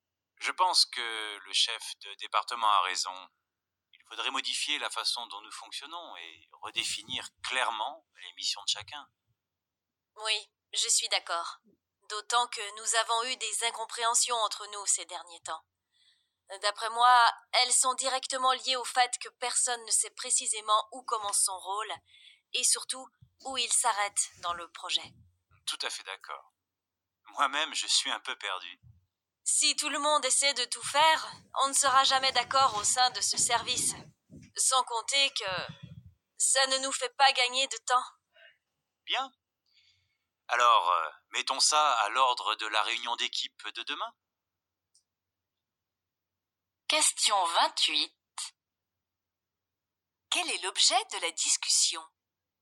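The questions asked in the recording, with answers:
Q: Quel est l'objet de la discussion ?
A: La nécessité de réorganiser le fonctionnement du service et de redéfinir clairement les rôles de chacun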